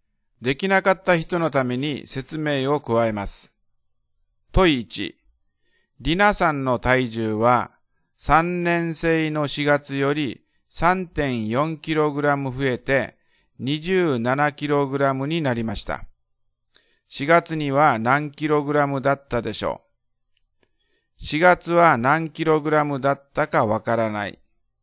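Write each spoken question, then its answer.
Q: 4月には何 kg だったでしょう。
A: 23.6kg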